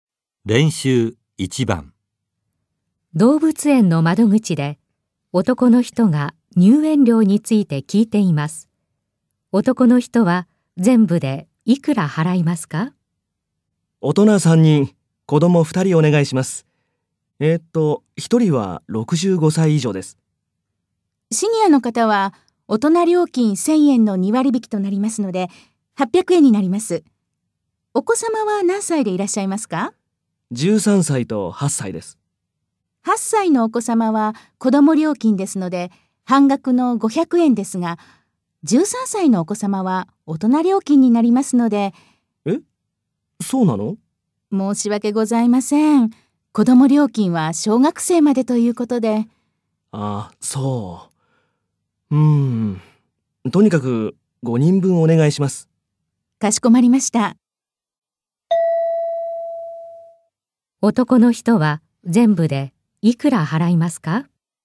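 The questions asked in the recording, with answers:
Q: 男の人は全部でいくら払いますか?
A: 4300円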